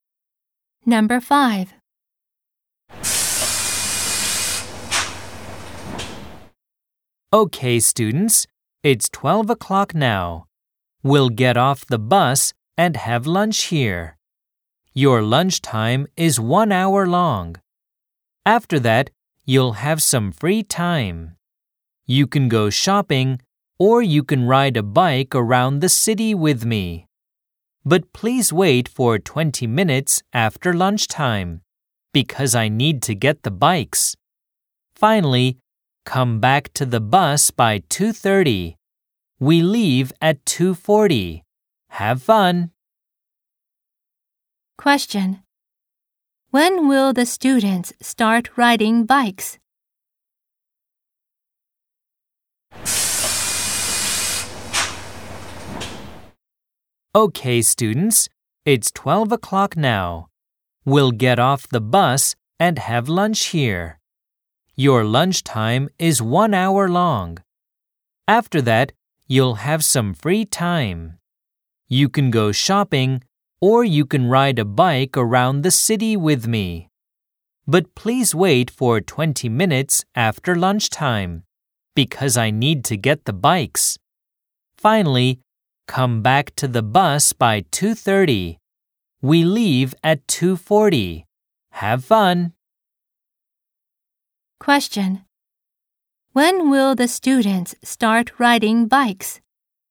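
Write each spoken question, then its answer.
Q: When will the students start riding bikes?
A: At 1:20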